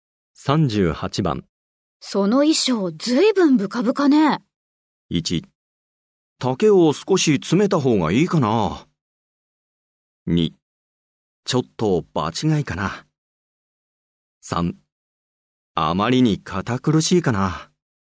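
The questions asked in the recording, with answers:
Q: その衣装ずいぶんブカブカね。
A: 1: 丈を少し詰めた方がいいかな。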